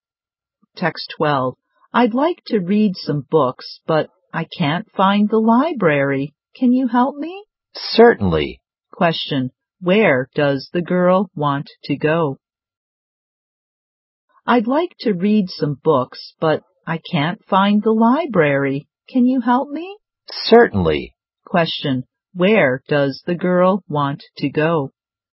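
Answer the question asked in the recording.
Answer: The library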